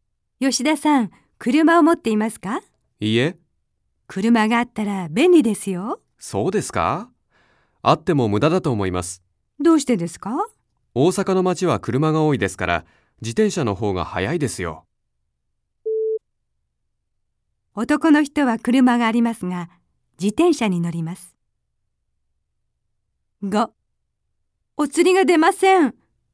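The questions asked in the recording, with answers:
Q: 男の人は車がありますが、自転車に乗ります。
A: ×(車を持っていない)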